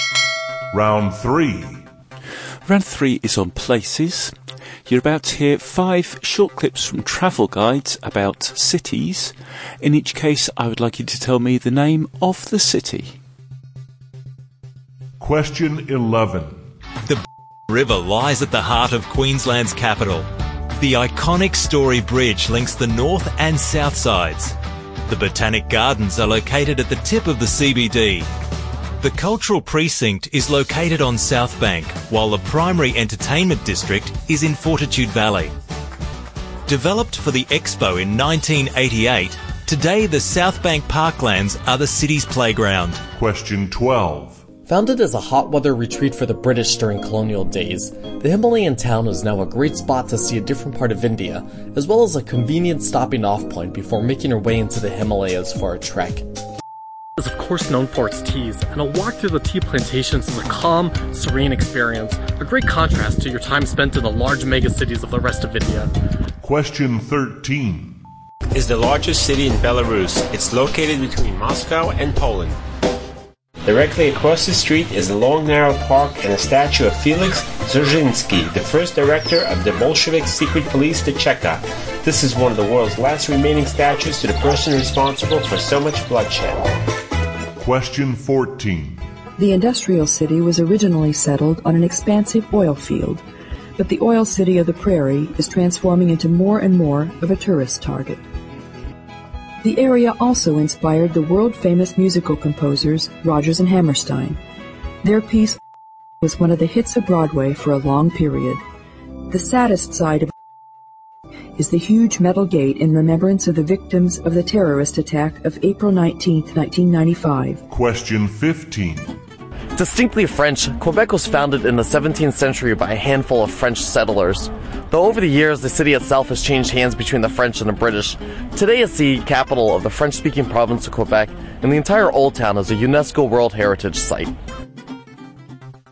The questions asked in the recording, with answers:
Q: In each case, I would like you to tell me the name of the city.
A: And number 15 was Quebec City.